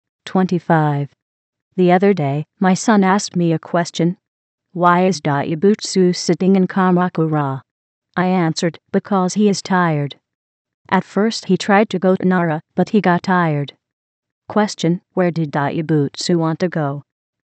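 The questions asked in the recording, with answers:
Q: Question, where did Dayabutsu want to go?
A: Nara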